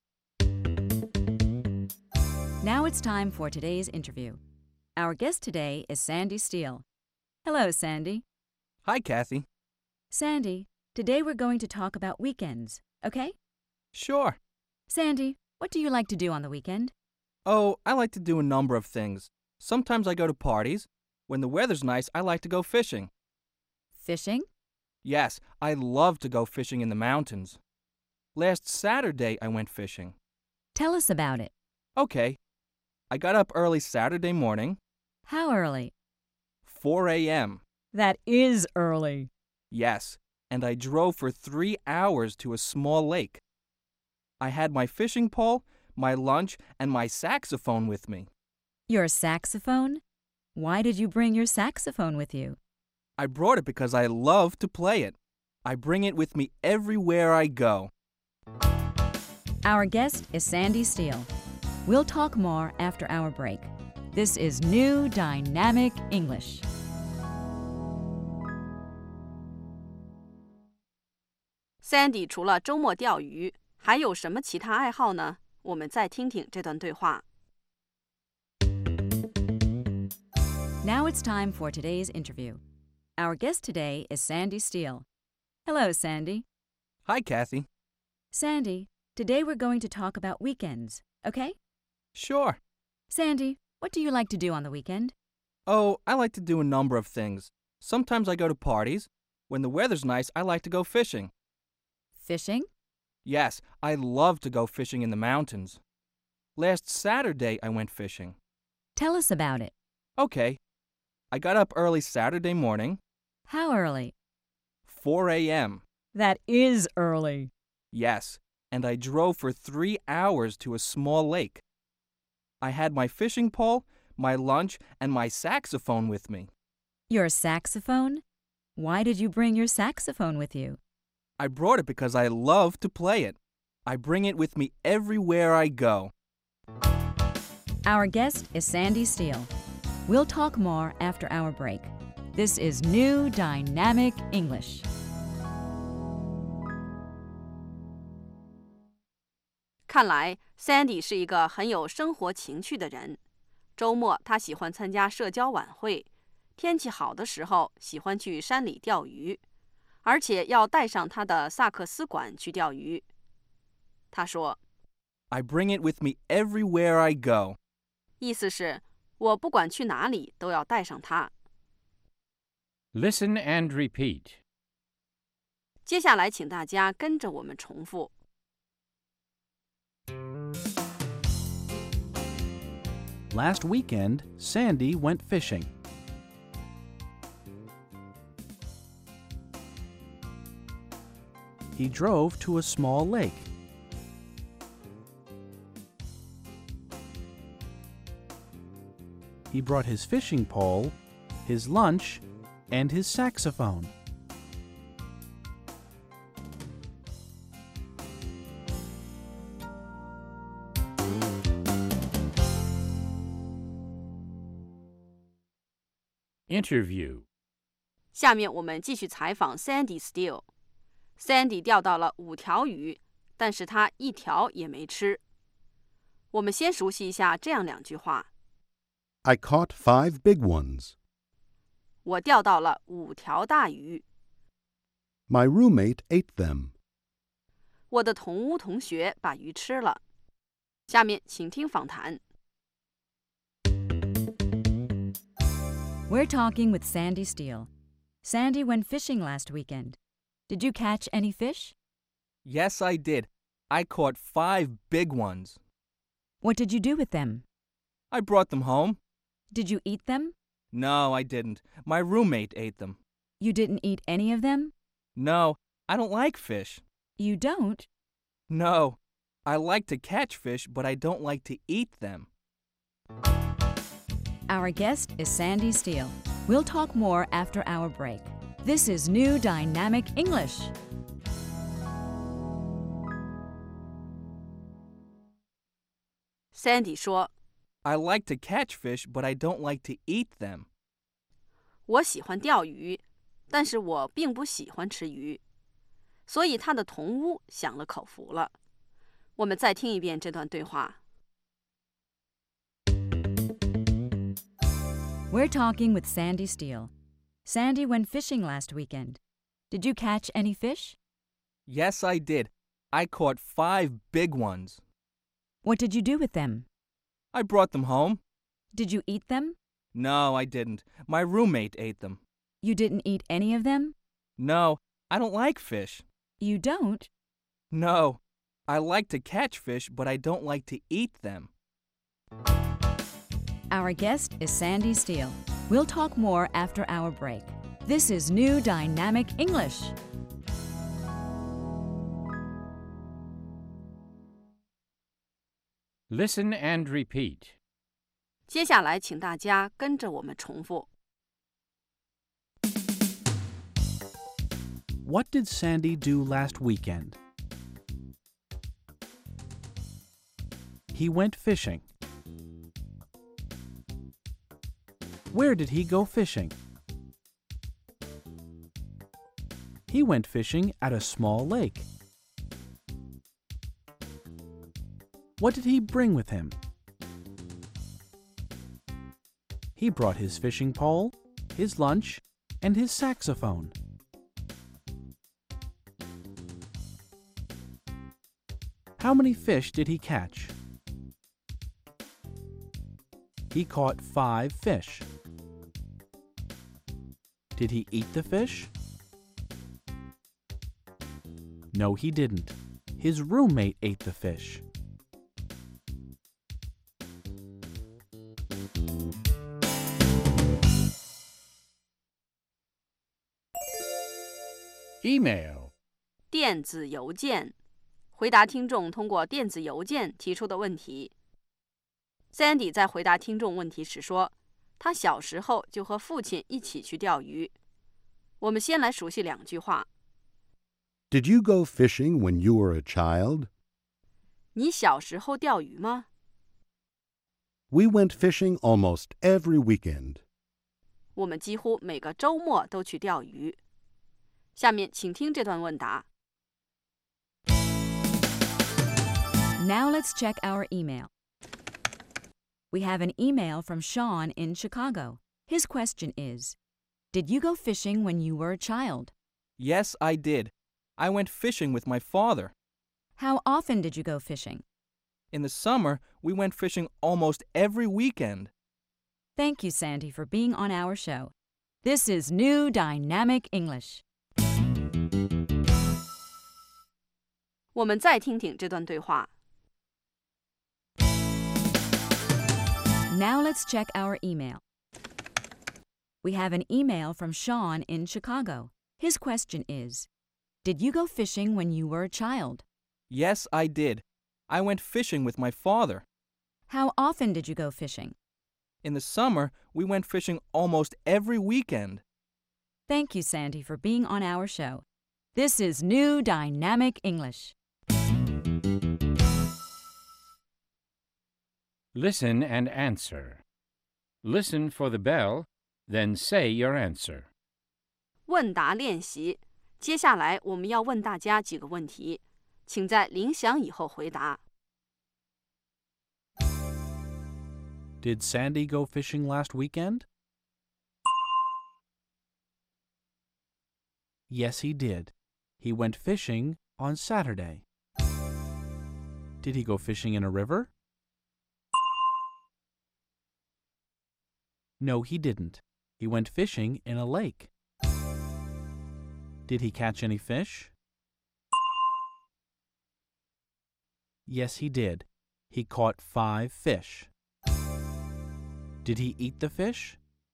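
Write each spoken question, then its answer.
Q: Did Sandy go fishing last weekend?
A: Yes, he did. He went fishing on Saturday.

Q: Did he go fishing in a river?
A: No, he didn't. He went fishing in a lake.

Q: Did he catch any fish?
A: Yes, he did. He caught 5 fish.

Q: Did he eat the fish?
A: No, he didn't. He doesn't like to eat fish.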